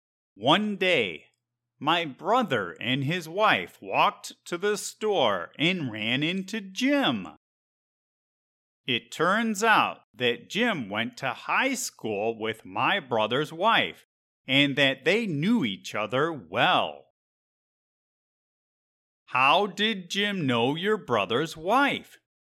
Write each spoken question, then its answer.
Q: How did Jim know your brother's wife?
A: Jim knew my brother's wife because they both went to the same high school.